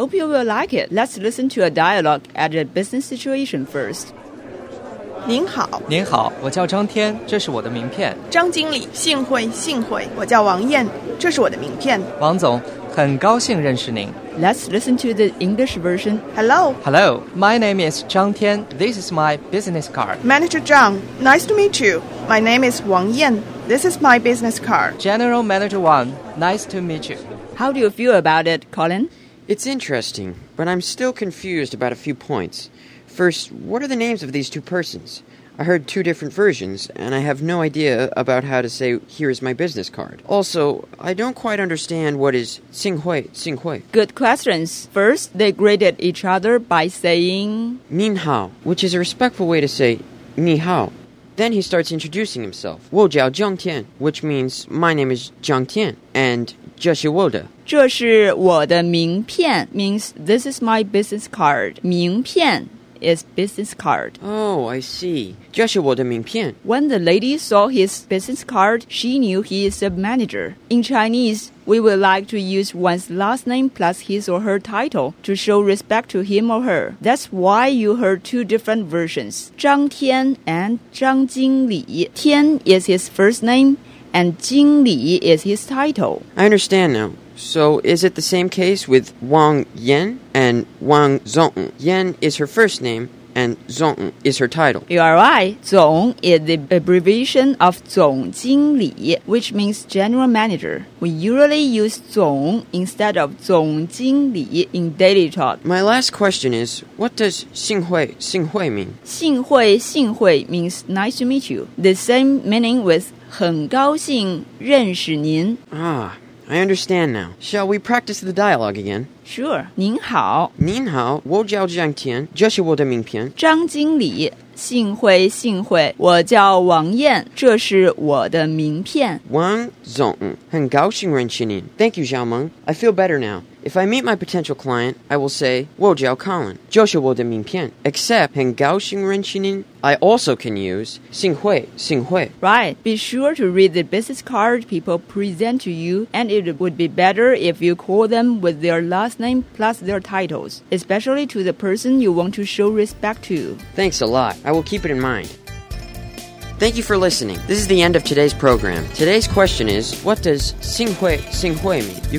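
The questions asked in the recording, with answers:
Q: Today's question is, what does 幸会幸会 mean?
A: Nice to meet you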